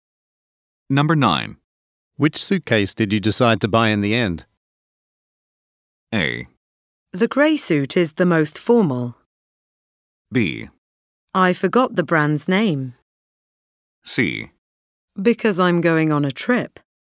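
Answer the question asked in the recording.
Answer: B: I forgot the brand's name.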